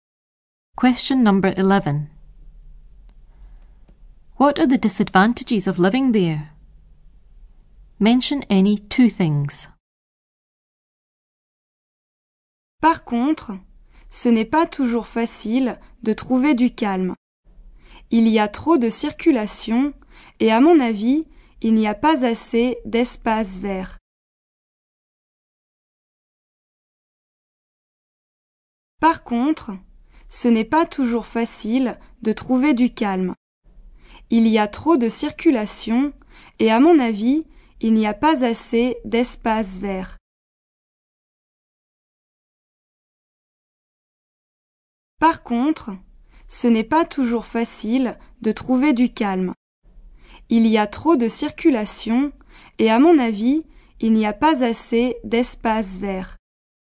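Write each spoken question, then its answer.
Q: What are the disadvantages of living there?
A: Hard to find peace and quiet; too much traffic; not enough green space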